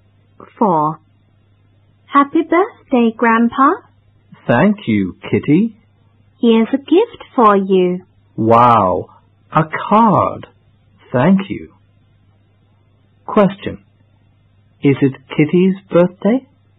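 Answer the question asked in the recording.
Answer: No, it isn't. It's Grandpa's birthday.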